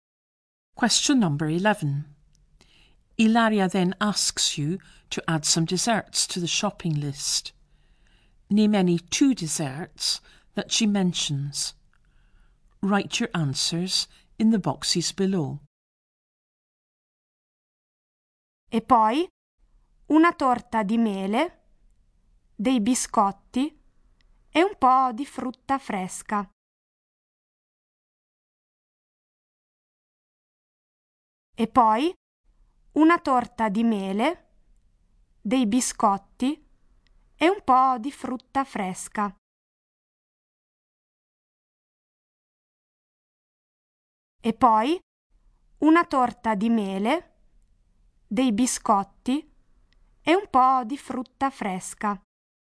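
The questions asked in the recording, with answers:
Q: Name any 2 desserts that she mentions.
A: Apple cake, biscuits, fresh fruit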